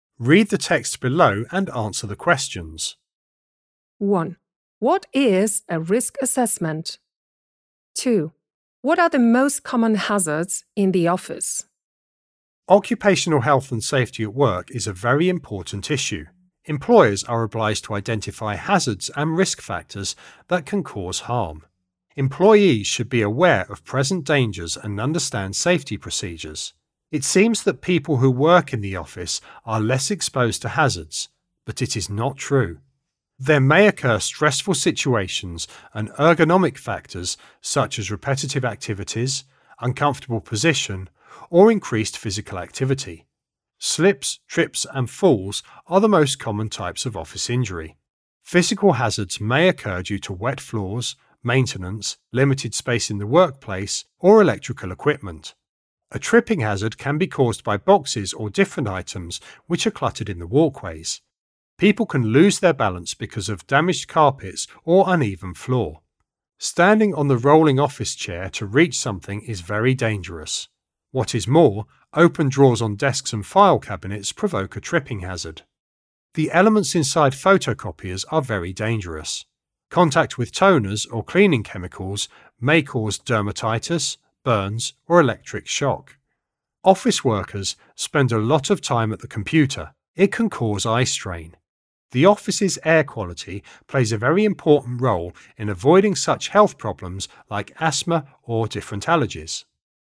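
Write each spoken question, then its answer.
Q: What are the most common hazards in the office?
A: Slips, trips, and falls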